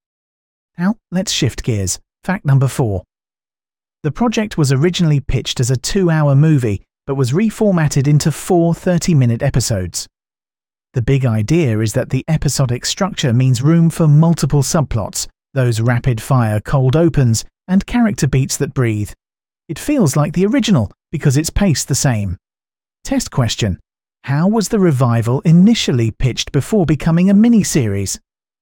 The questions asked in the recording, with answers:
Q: How was the revival initially pitched before becoming a miniseries?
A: Correct answer. As a 2-hour movie.